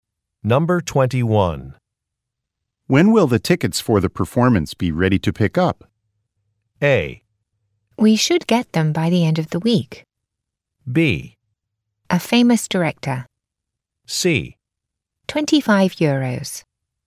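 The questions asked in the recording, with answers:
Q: When will the tickets for the performance be ready to pick up?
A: A: We should get them by the end of the week.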